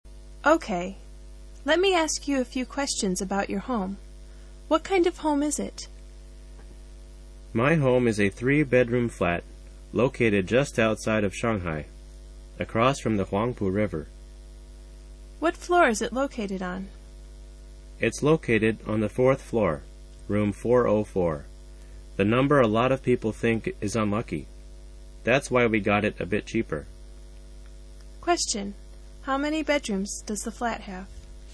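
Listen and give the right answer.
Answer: Three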